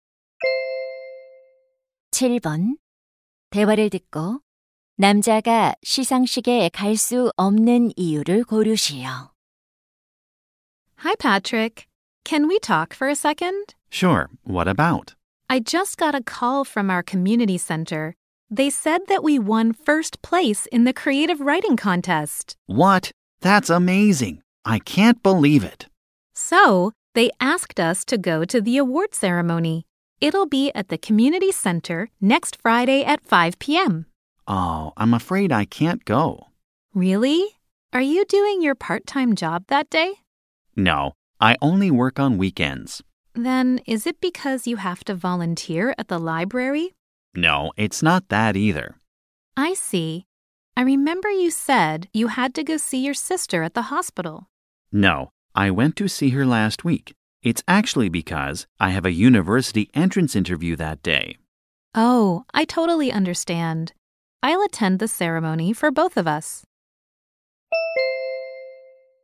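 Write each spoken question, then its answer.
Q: 남자가 시상식에 갈 수 없는 이유를 고르시오.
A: 대학 입학 면접이 있어서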